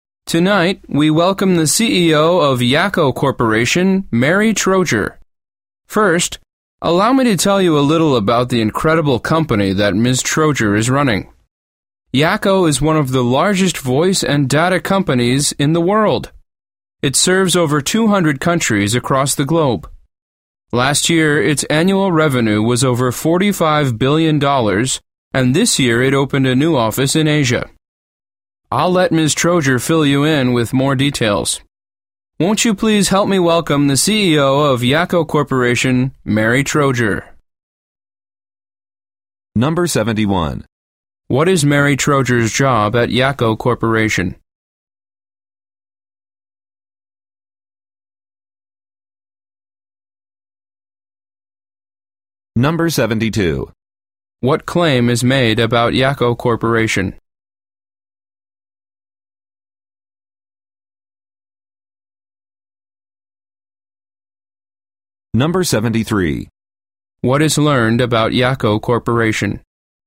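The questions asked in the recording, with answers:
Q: What is Mary Troger's job at Yakko Corporation?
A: She is the CEO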